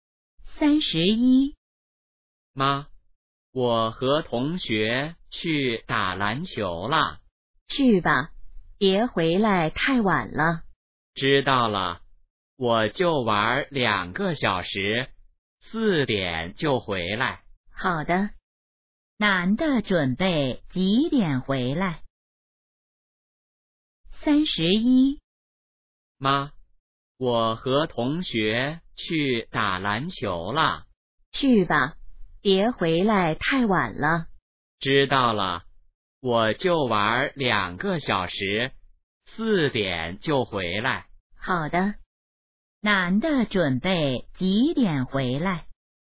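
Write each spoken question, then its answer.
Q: 男的准备几点回来?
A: 四点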